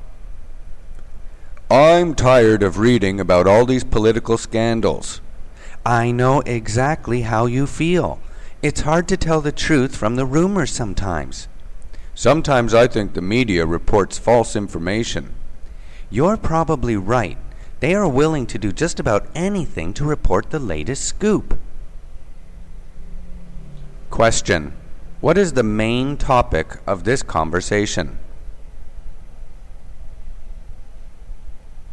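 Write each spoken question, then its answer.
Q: What is the main topic of this conversation?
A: The media reporting false information about political scandals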